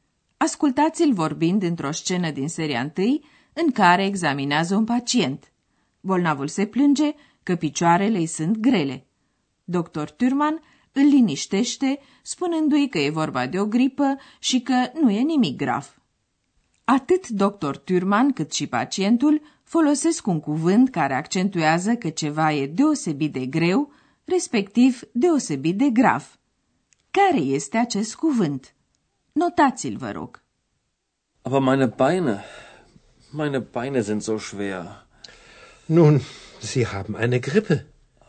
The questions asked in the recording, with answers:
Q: Care este acest cuvânt?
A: Ultimul cuvânt căutat era zo, așa.